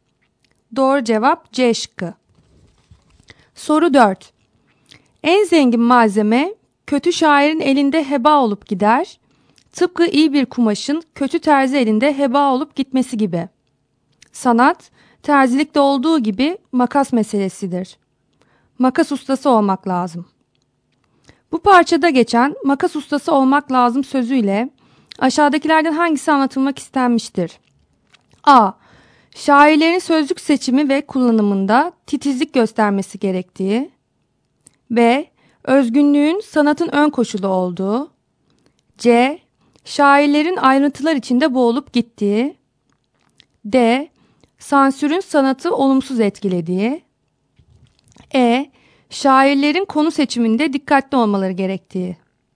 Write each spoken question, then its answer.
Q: Bu parçada geçen makas ustası olmak lazım sözüyle aşağıdakilerden hangisi anlatılmak istenmiştir?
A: Doğru cevap A şıkkı.